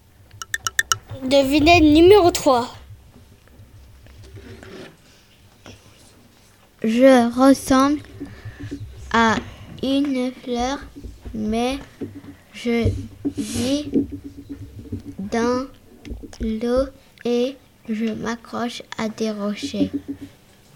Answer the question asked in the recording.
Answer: Je suis la lémène des mers.